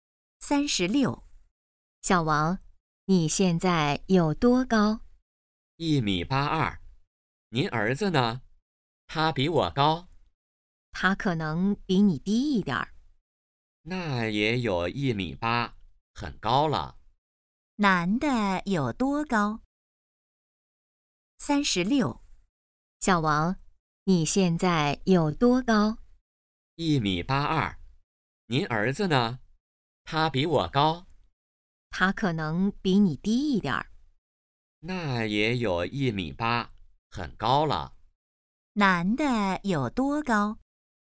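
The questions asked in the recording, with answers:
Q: 男的有多高?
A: 1.82米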